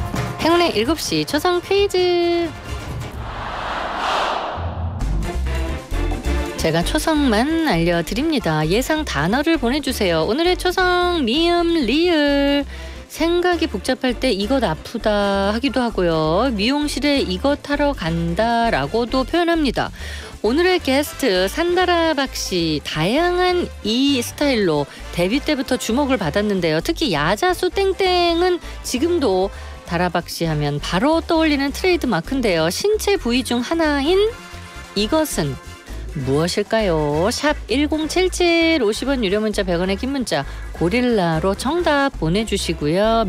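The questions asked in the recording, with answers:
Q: 신체 부위 중 하나인 이것은 무엇일까요?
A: 머리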